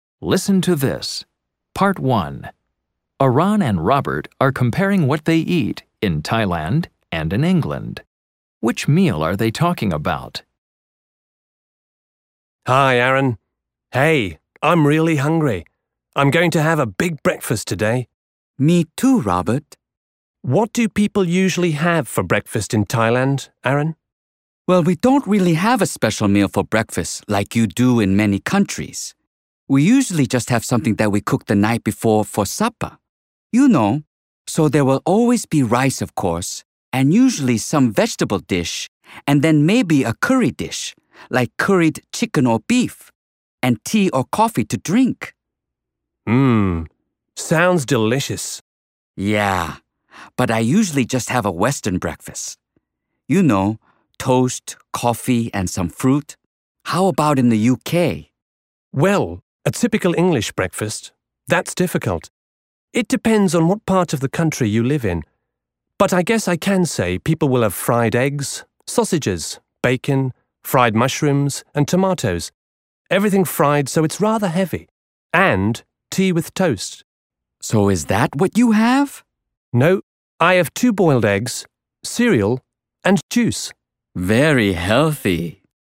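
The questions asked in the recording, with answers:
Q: Which meal are they talking about?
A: Breakfast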